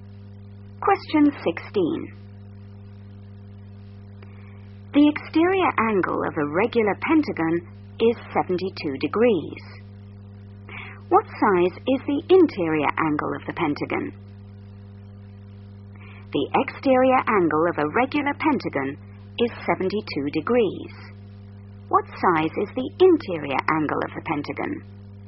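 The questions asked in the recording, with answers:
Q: What size is the interior angle of the pentagon?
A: 108 degrees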